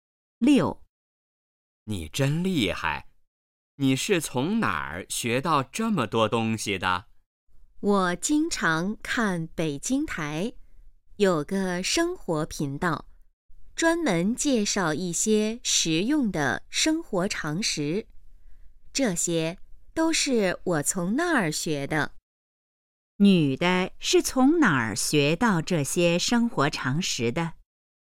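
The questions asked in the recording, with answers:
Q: 女的是从哪儿学到这些生活常识的?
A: 北京台的生活频道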